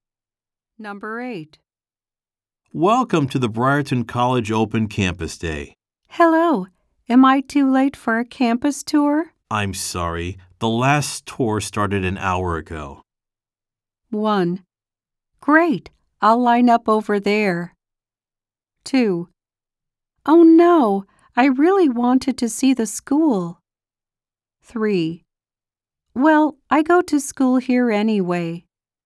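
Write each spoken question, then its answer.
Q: I'm sorry. The last tour started an hour ago.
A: 2: Oh no, I really wanted to see the school.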